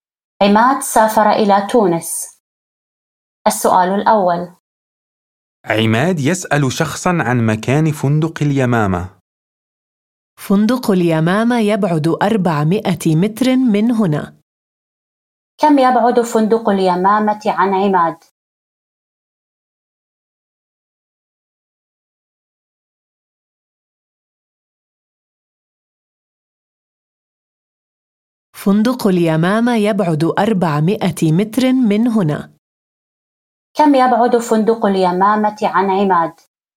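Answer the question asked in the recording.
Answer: 400 متر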